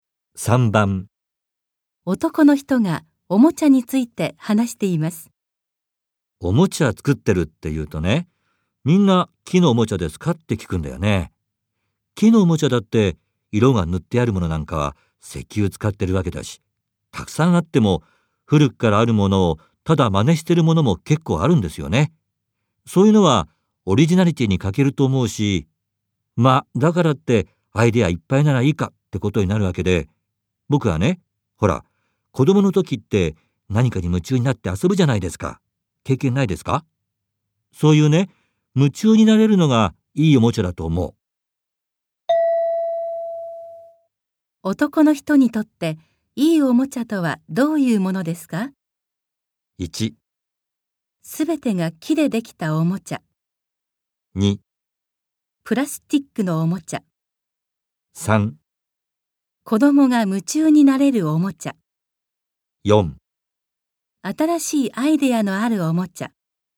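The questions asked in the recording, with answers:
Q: 男の人にとっていいおもちゃとはどういうものですか?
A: 3: 子供が夢中になれるおもちゃ。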